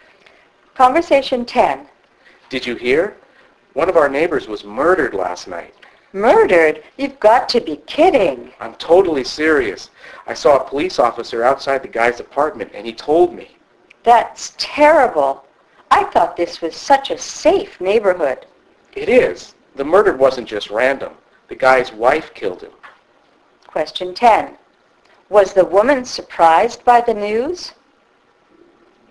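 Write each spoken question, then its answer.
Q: Was the woman surprised by the news?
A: Yes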